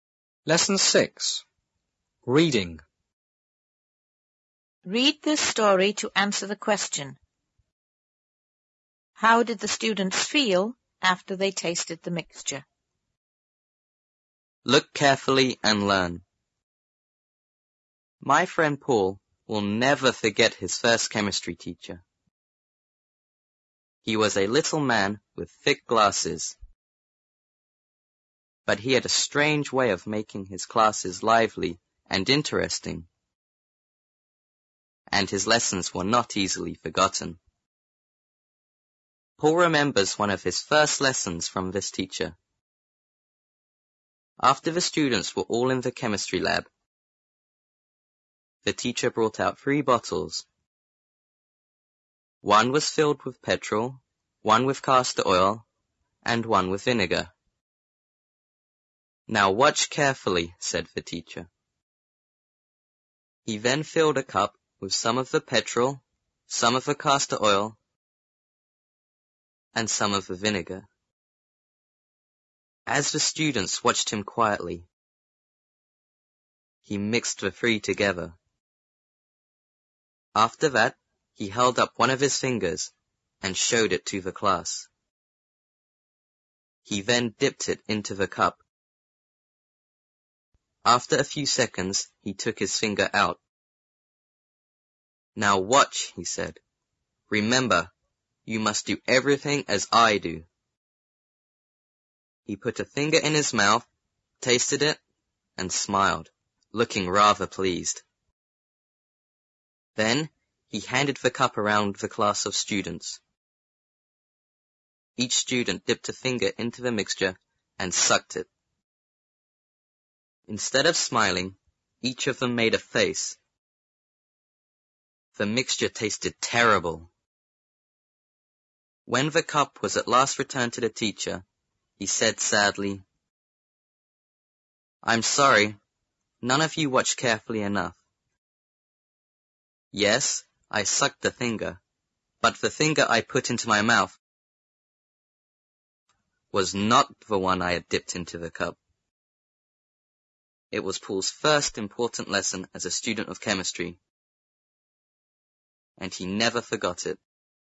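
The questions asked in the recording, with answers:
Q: How did the students feel after they tasted the mixture?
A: They felt bad because the mixture tasted terrible, so each of them made a face.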